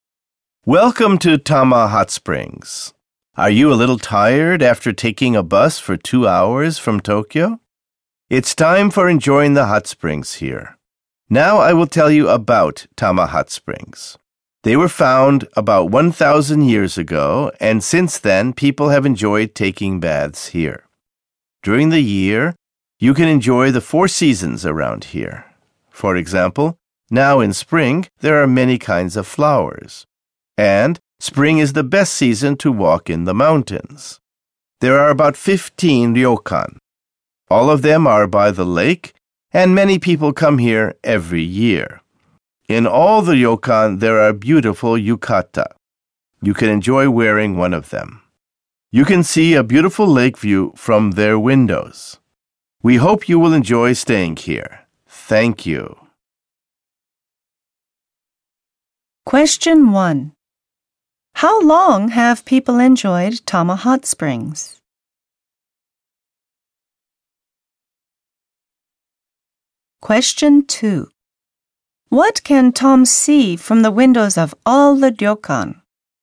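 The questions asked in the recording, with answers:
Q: How long have people enjoyed Tama Hot Springs?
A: For about 1,000 years.

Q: What can Tom see from the windows of all the ryokan?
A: A beautiful lake view.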